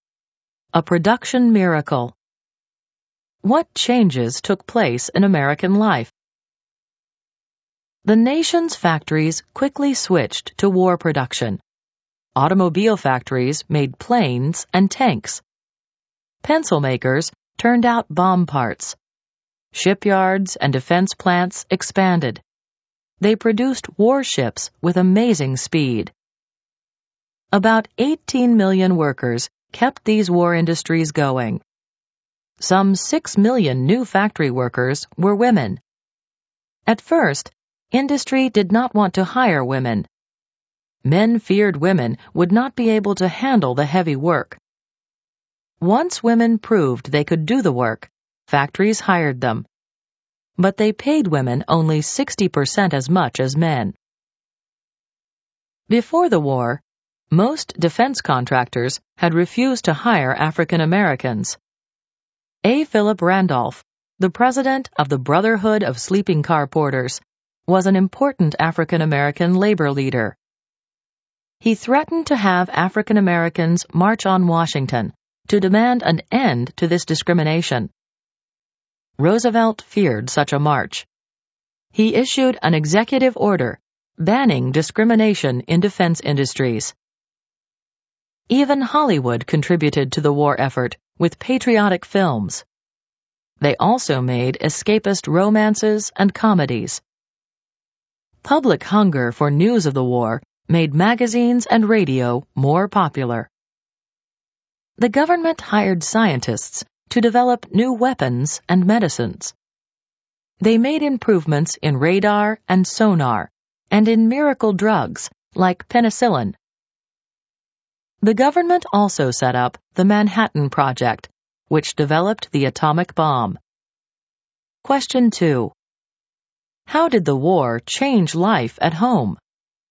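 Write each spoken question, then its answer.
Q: How did the war change life at home?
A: Factories switched to war production, and millions of workers, including 6 million women, took factory jobs. Discrimination in defense industries was banned. Hollywood, magazines and radio supported the war, and scientists developed radar, penicillin and the atomic bomb.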